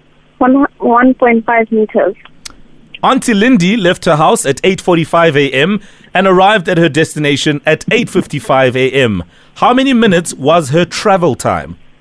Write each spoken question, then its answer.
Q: How many minutes was her travel time?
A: It would be 10 minutes.